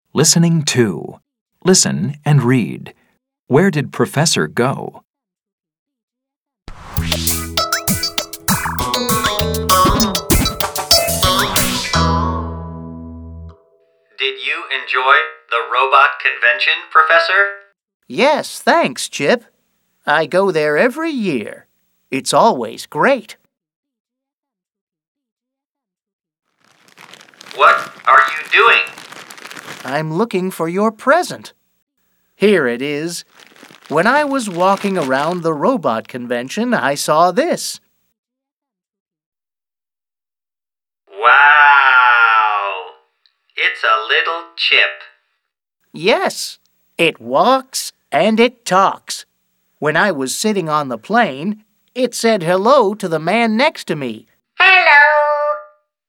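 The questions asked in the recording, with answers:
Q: Where did Professor go?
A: To the robot convention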